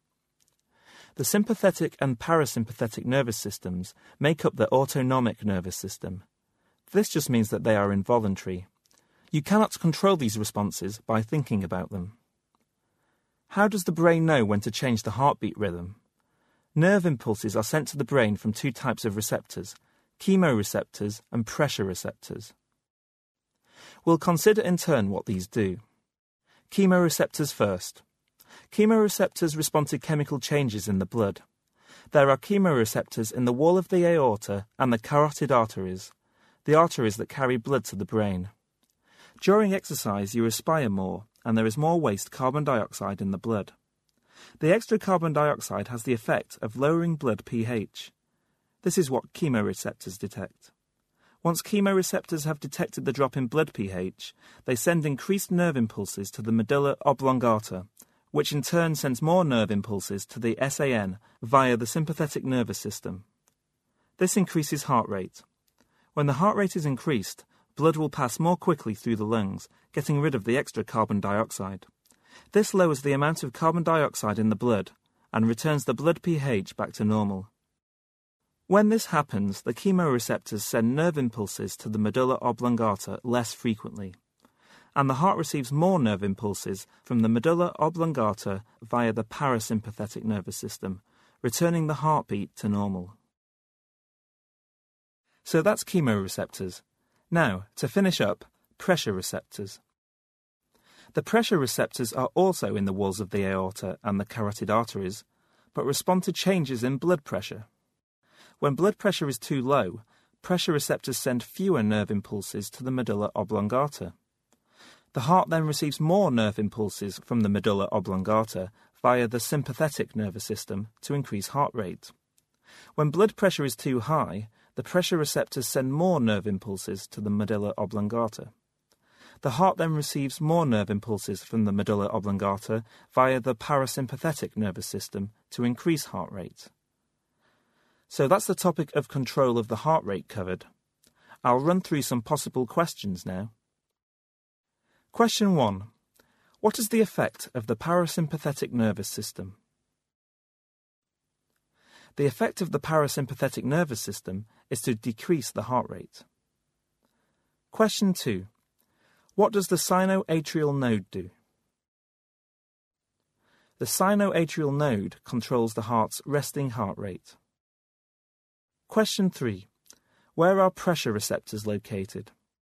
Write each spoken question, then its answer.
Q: Where are pressure receptors located?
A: The pressure receptors are in the wall of the aorta and the carotid arteries.